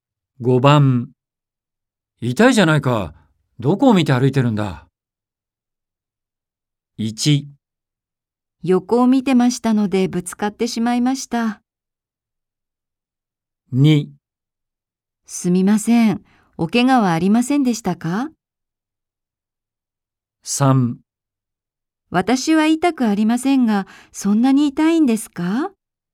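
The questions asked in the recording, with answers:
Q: 痛いじゃないか。どこを見て歩いてるんだ。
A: 2: すみません。おけがはありませんでしたか?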